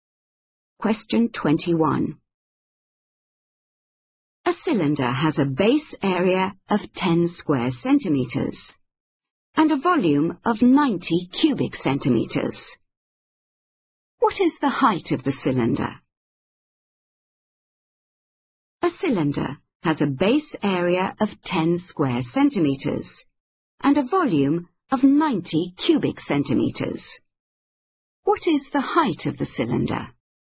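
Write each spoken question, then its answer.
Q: What is the height of the cylinder?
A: 9 centimeters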